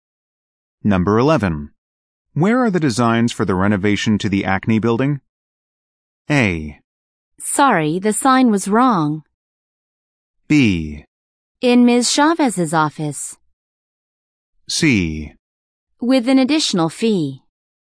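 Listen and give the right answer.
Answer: B: In Ms. Chavez's office.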